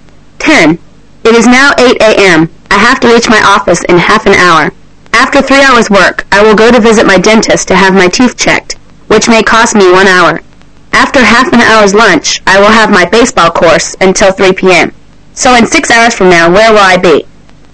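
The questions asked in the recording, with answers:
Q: So in 6 hours from now, where will I be?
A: At my baseball course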